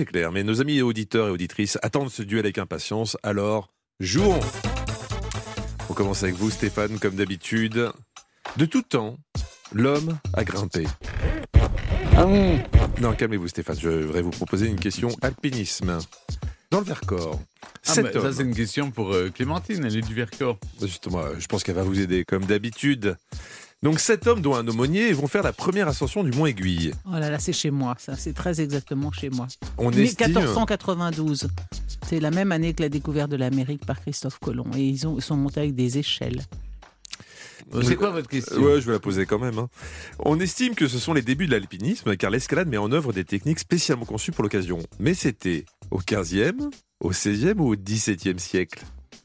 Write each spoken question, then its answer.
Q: Mais c'était au 15e, au 16e ou au 17e siècle?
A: Non, c'est au 15e. Et plus précisément, vous ne le saviez pas, mais c'était en 1492.